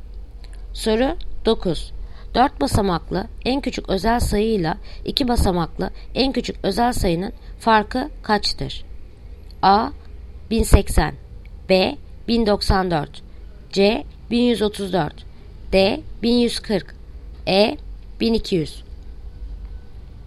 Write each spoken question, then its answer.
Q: 4 basamaklı en küçük özel sayıyla 2 basamaklı en küçük özel sayının farkı kaçtır?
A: Yanıt Adana. 1080.